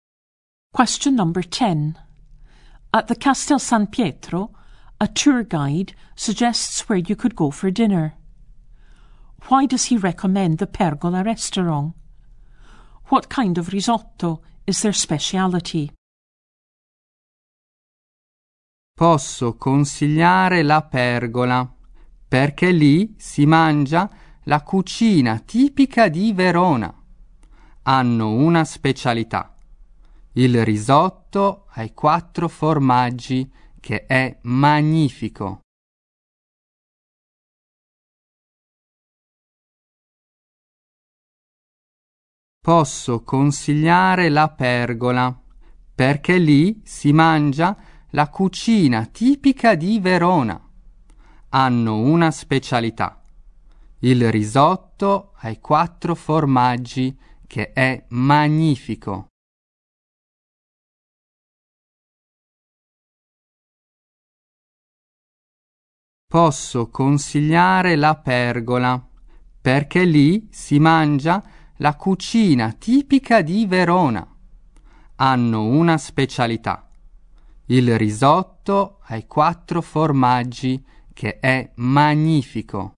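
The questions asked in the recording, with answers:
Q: Why does he recommend the Pergola restaurant?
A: It serves typical Verona cooking

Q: What kind of risotto is their speciality?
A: Four-cheese risotto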